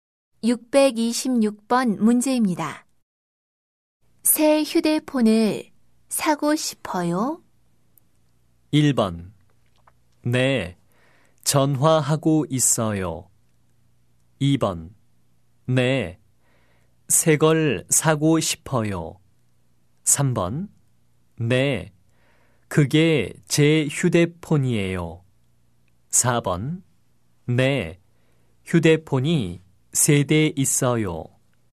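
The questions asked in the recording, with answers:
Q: 새 휴대폰을 사고 싶어요?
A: 2: 네, 새 걸 사고 싶어요.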